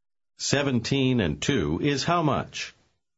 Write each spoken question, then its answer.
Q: 17 and 2 is how much?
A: 19.